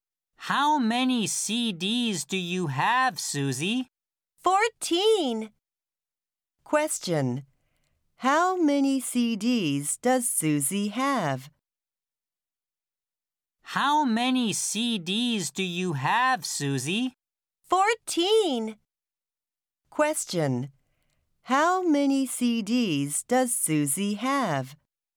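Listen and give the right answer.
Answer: 14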